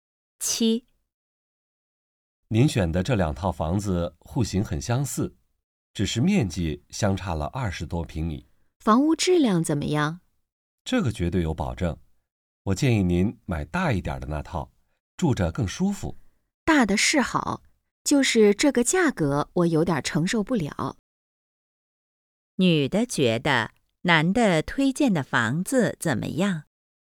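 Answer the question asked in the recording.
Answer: 太贵了,价格承受不了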